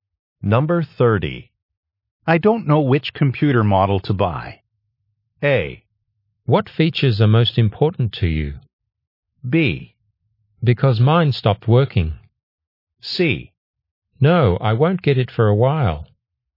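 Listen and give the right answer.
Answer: A: What features are most important to you?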